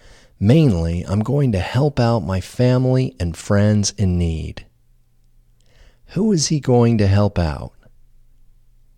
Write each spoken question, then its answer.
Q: Who is he going to help out?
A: He is going to help out his family and friends in need.